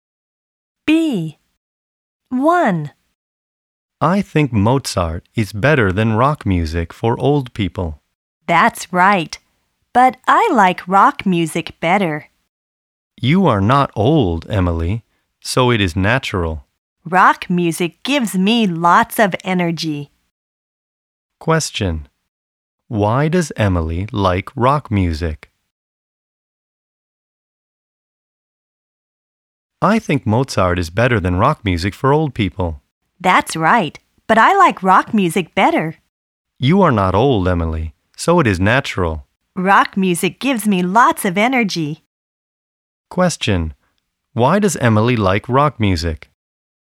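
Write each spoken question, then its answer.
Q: Why does Emily like rock music?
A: It gives her lots of energy.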